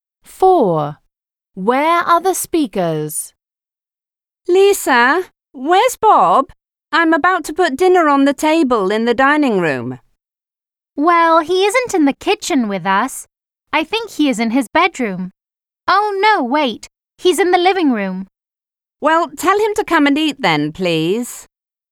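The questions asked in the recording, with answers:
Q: Where are the speakers?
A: In the kitchen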